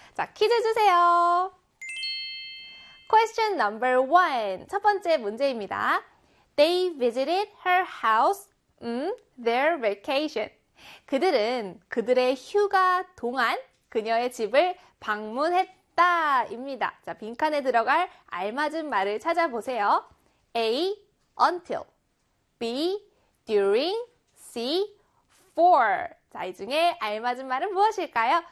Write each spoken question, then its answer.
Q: 자, 빈칸에 들어갈 알맞은 말을 찾아보세요. A, until. B, during. C, for. 자, 이 중에 알맞은 말은 무엇일까요?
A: 네, 바로 B의 during이죠.